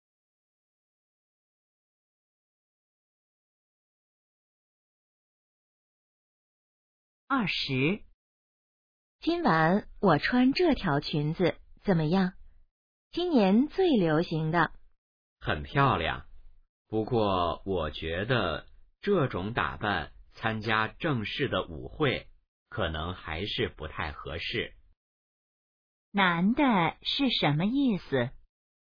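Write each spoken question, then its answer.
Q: 男的是什么意思?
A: 这条裙子不适合参加正式舞会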